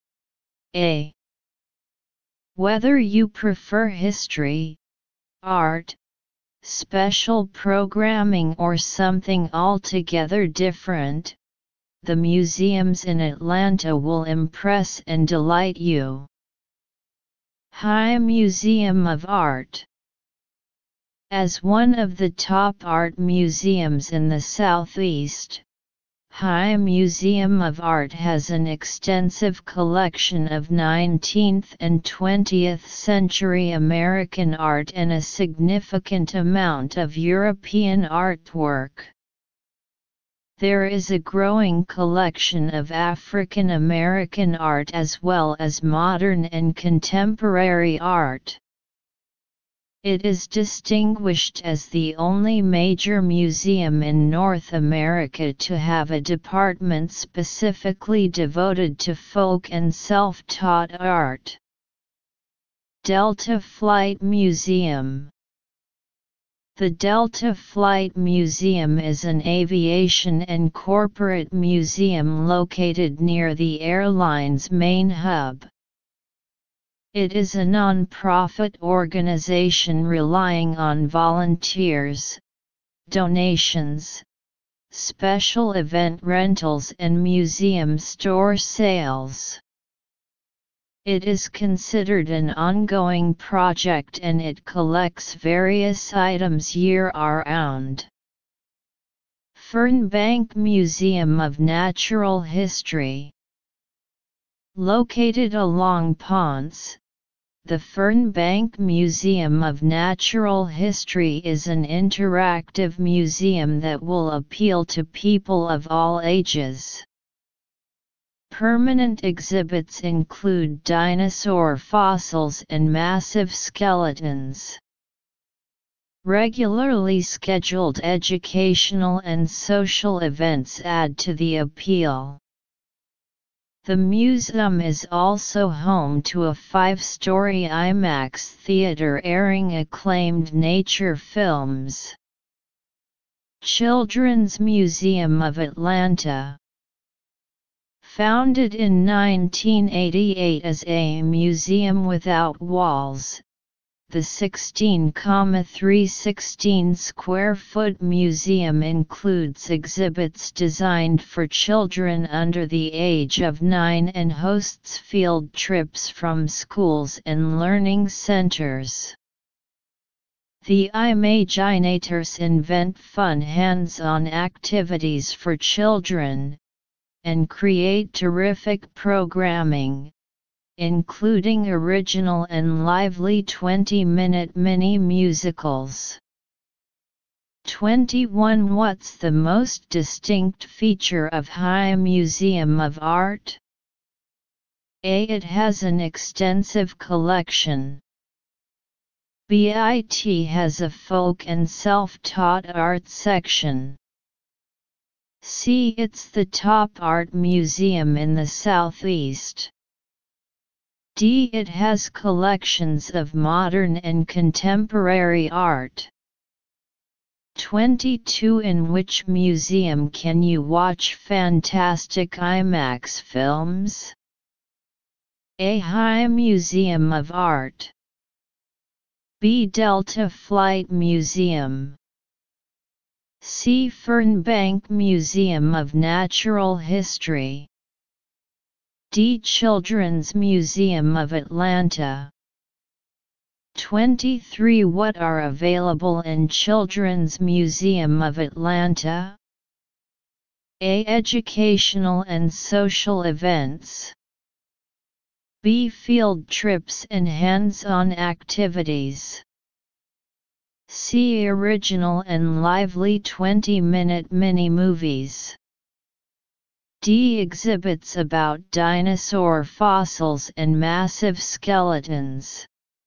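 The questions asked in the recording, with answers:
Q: What's the most distinct feature of High Museum of Art?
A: B: It has a folk and self-taught art section.

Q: In which museum can you watch fantastic IMAX films?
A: C: Fernbank Museum of Natural History.

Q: What are available in Children's Museum of Atlanta?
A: B: Field trips and hands-on activities.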